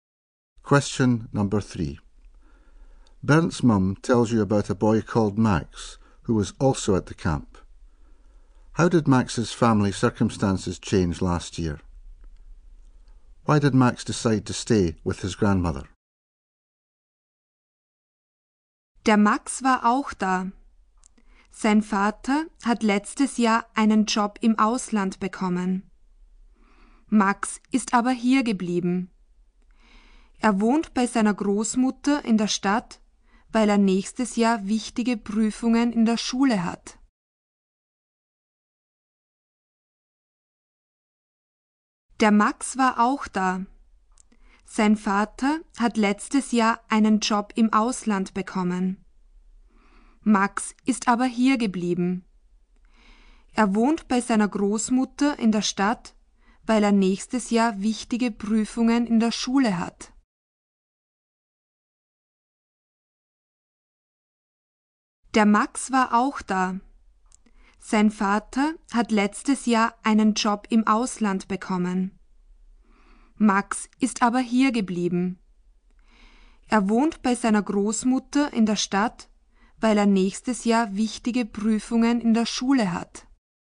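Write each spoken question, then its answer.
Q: How did Max's family circumstances change last year?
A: His father got a job abroad

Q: Why did Max decide to stay with his grandmother?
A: He has important exams at school next year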